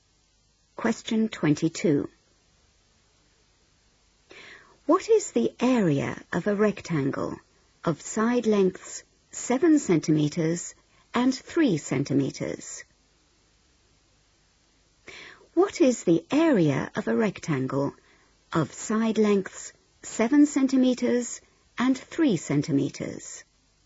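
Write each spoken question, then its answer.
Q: What is the area of a rectangle of side lengths 7 centimeters and 3 centimeters?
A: 21 cm2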